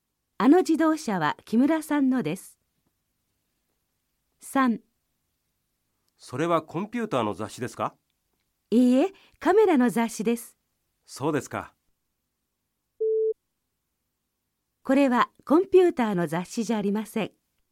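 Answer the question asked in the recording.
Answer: ○(カメラの雑誌です)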